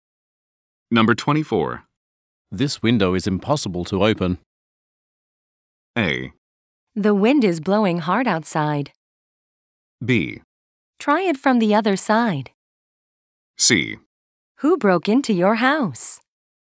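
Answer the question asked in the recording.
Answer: B: Try it from the other side.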